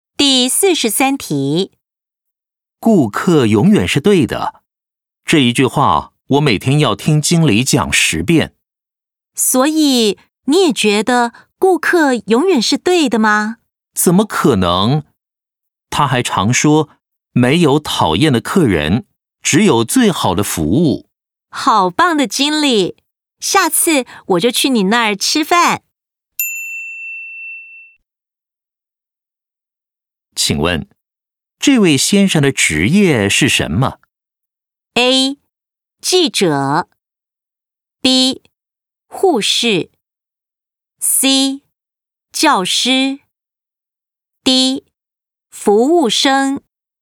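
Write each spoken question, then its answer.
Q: 请问,这位先生的职业是什么?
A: D: 服务生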